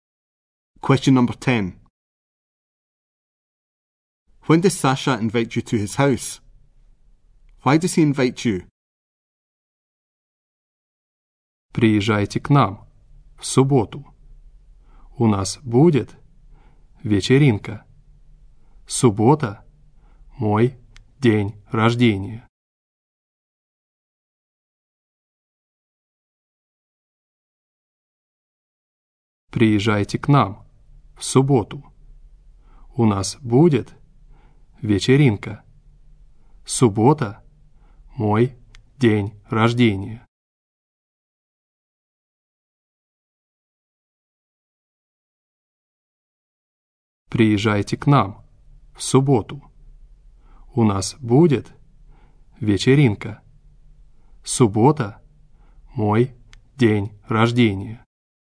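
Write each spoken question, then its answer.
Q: When does Sasha invite you to his house?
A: On Saturday

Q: Why does he invite you?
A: For a party; it is his birthday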